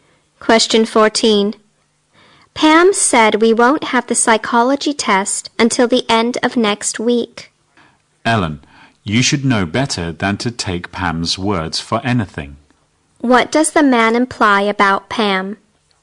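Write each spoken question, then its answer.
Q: What does the man imply about Pam?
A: What Pam says can't be trusted.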